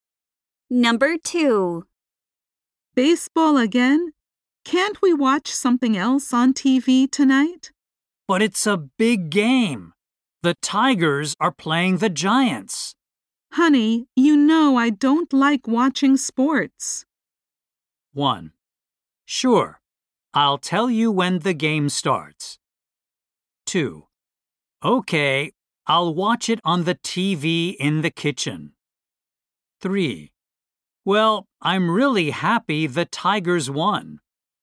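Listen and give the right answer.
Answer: 2: Okay, I'll watch it on the TV in the kitchen.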